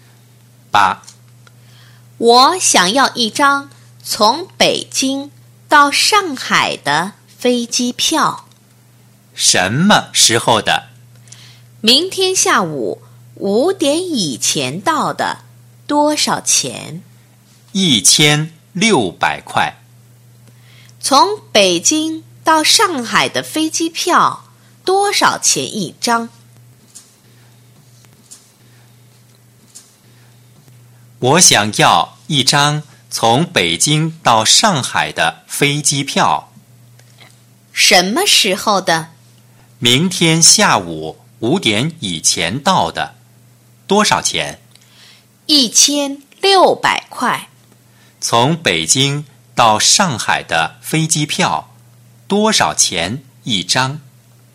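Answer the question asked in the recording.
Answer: 1600块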